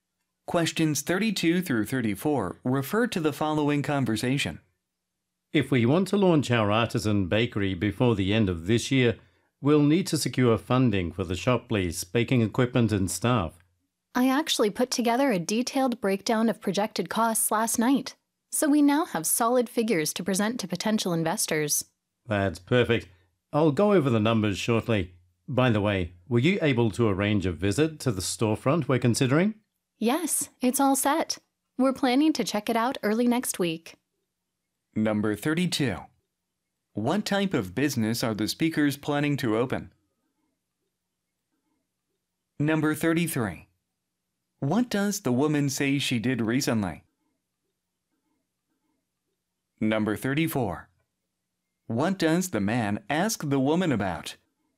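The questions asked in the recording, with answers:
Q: What type of business are the speakers planning to open?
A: A bakery

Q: What does the woman say she did recently?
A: Prepared a detailed breakdown of projected costs

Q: What does the man ask the woman about?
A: Whether she arranged a visit to the storefront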